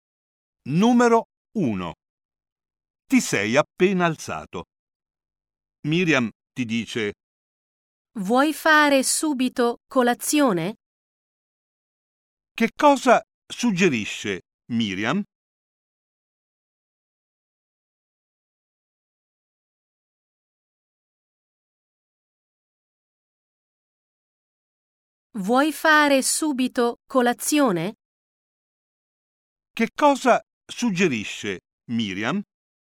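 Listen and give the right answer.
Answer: Fare subito colazione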